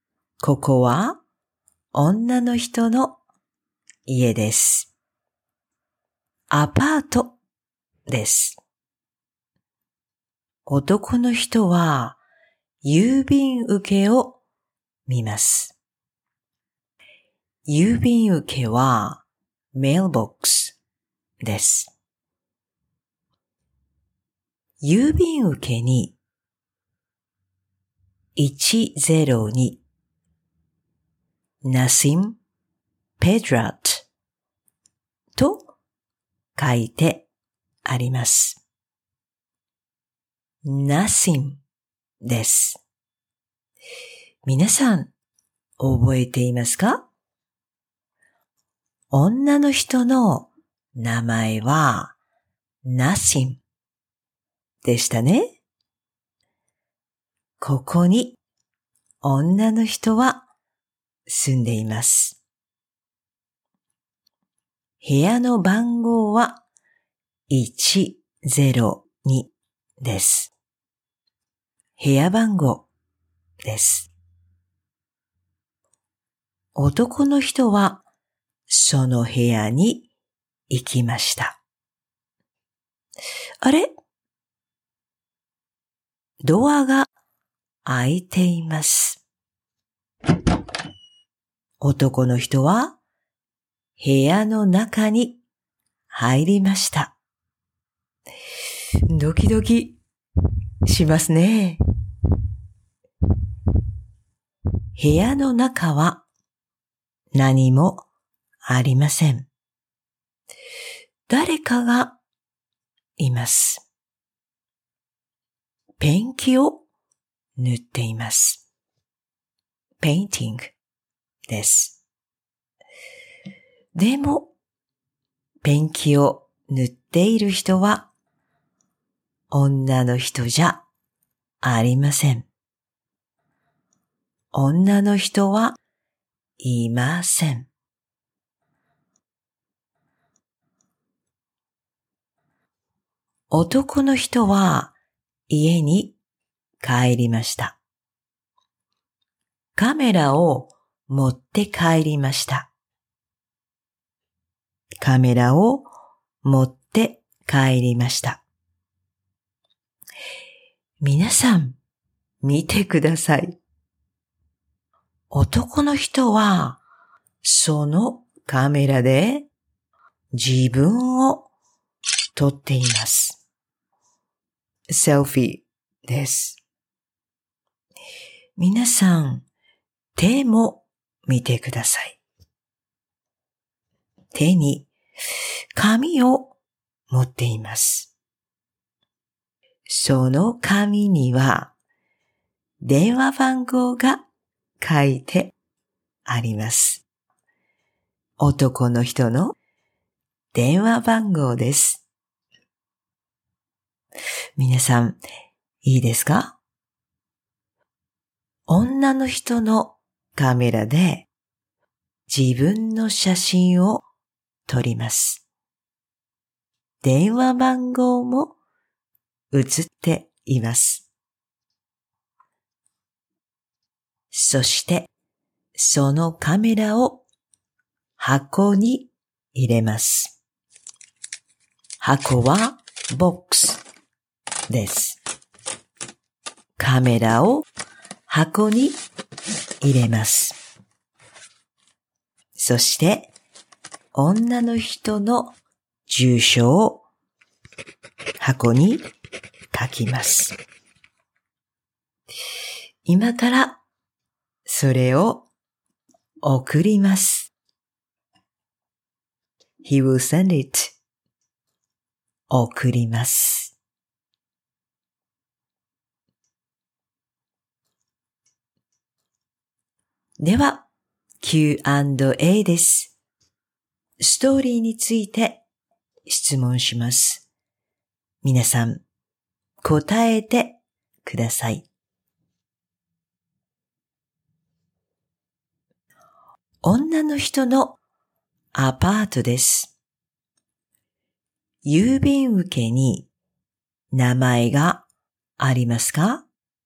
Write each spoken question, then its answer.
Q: 郵便受けに名前がありますか?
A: はい、あります。